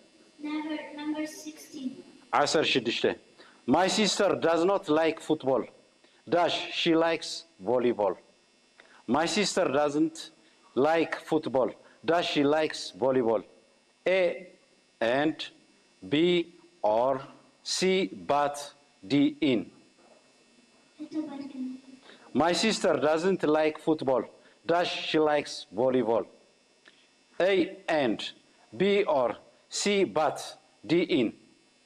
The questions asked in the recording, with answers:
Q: My sister does not like football. Dash, she likes volleyball.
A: But.